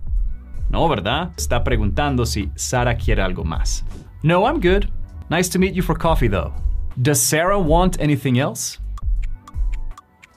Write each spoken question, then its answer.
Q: Does Sarah want anything else?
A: No, she doesn't.